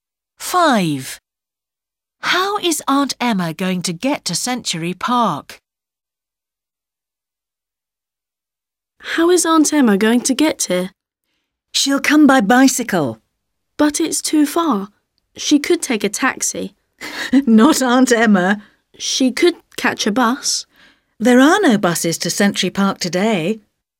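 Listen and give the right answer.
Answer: by bicycle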